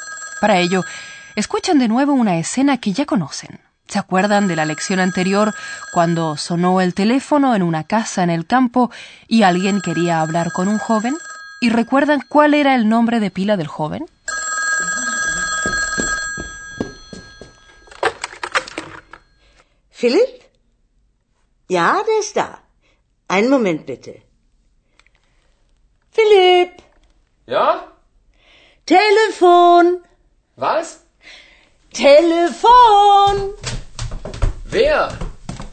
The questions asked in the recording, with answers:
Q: ¿Y recuerdan cuál era el nombre de pila del joven?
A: De modo que el joven se llama Philip.